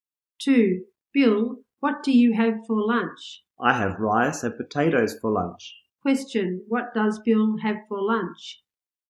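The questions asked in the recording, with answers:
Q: What does Bill have for lunch?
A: Rice and potatoes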